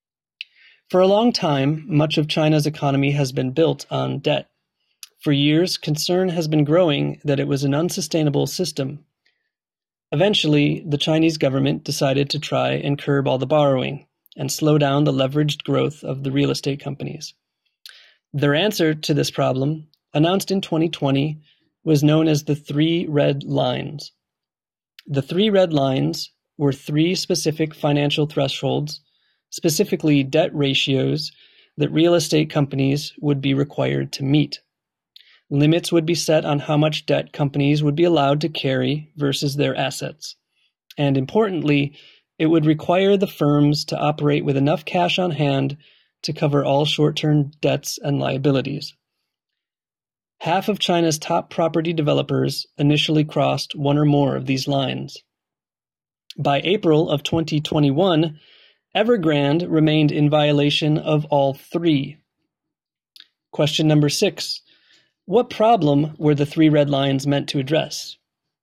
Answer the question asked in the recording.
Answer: The three red lines were meant to curb over-leveraging by real estate companies that were acquiring too much debt too fast.